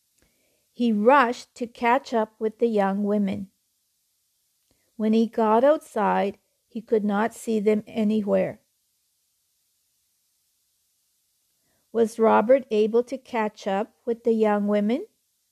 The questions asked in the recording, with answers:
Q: Was Robert able to catch up with the young women?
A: No. When he got outside, he couldn't see them anywhere.